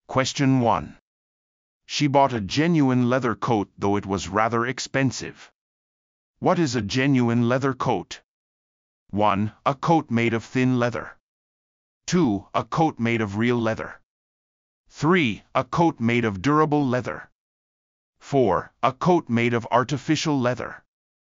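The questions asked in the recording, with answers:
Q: What is a genuine leather coat?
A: 2: A coat made of real leather.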